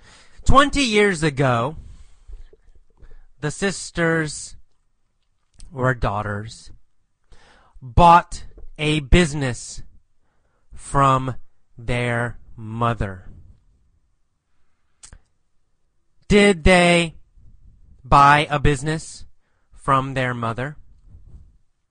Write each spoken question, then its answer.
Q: Did they buy a business from their mother?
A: Yes, they did.